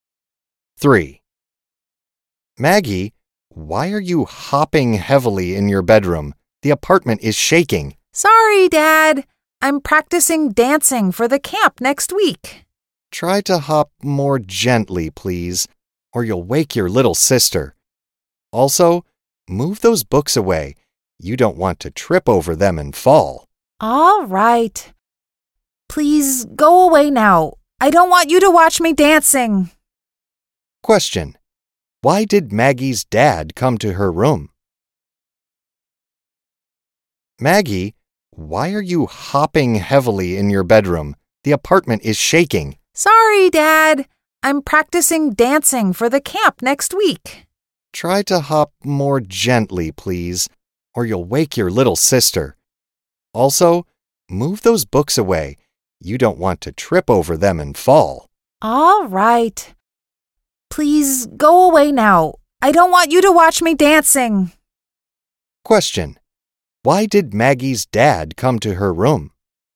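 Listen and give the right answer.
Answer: She was hopping heavily while practicing dancing, and the apartment was shaking.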